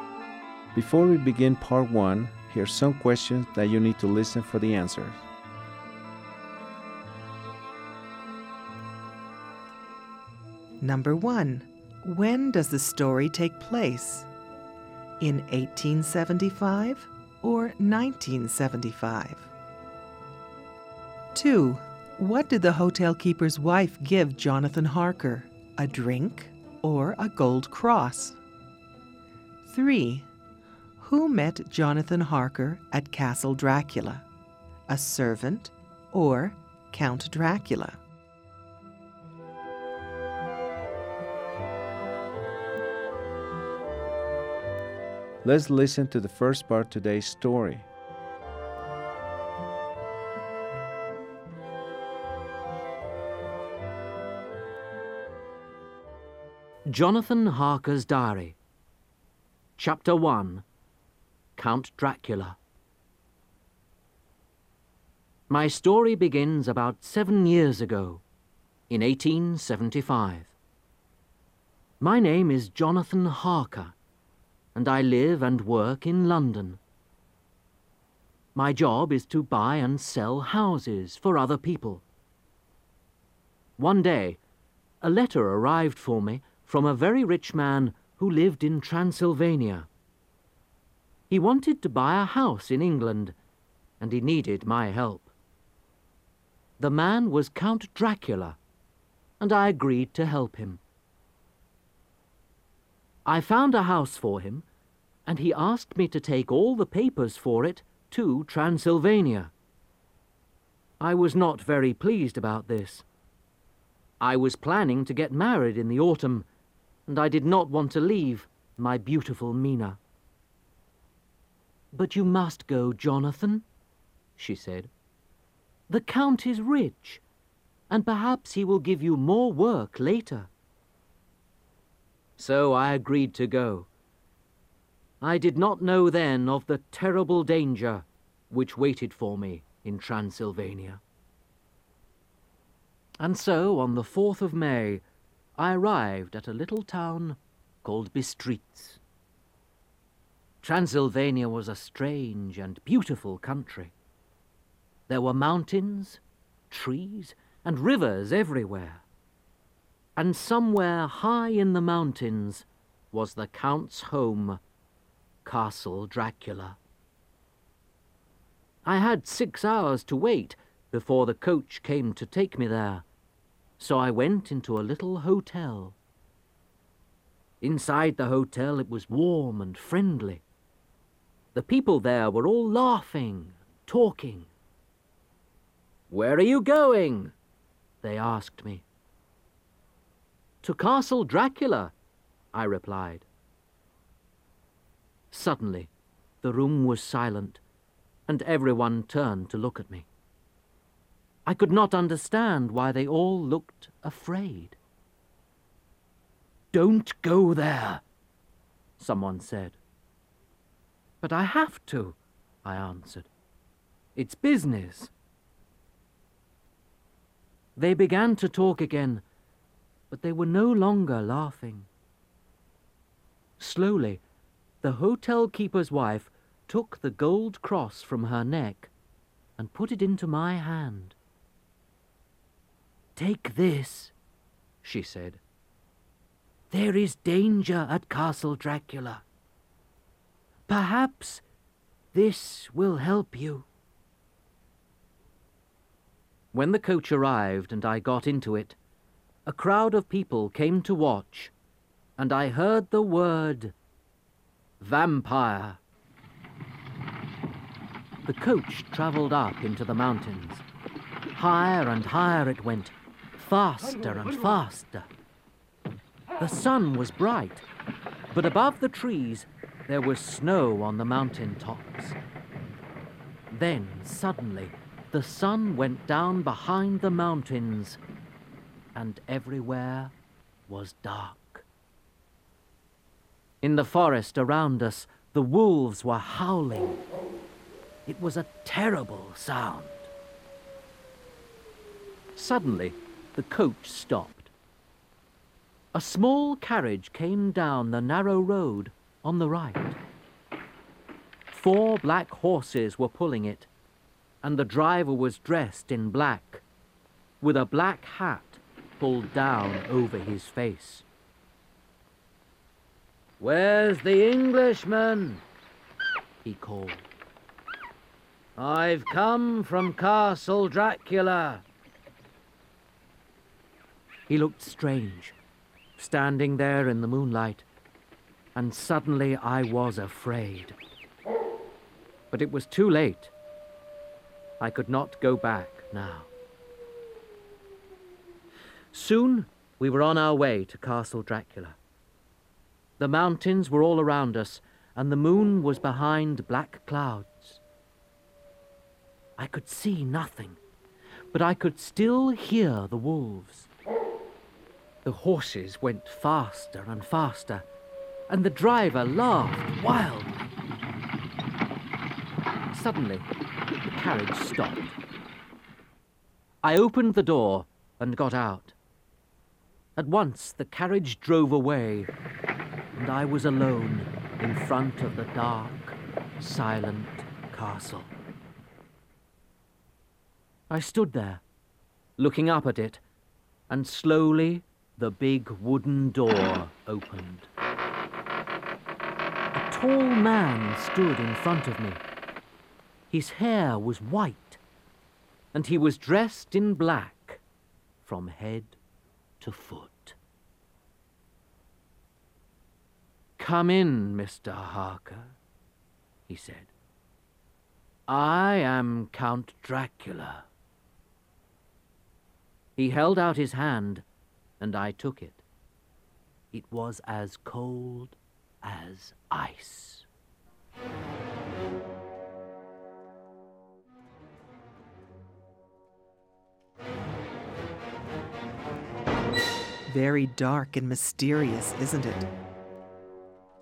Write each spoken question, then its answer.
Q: when does the story take place? In 1875 or 1975?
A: The story takes place in 1875.

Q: what did the hotel keeper's wife give Jonathan Harker? A drink or a gold cross?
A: The hotel keeper's wife gave Jonathan a gold cross from her neck to protect him.

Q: who met Jonathan Harker at Castle Dracula? A servant or Count Dracula?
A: he arrived at Castle Dracula, where he was met by Count Dracula.